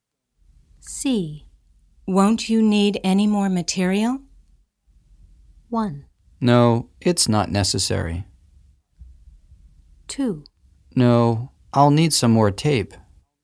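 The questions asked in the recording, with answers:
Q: Won't you need any more material?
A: 1: No, it's not necessary.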